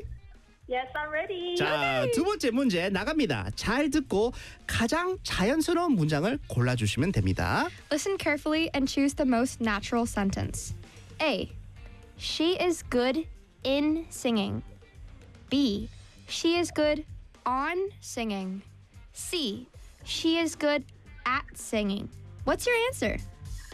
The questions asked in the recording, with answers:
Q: What's your answer?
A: 정답은 3번, good at으로 하겠습니다.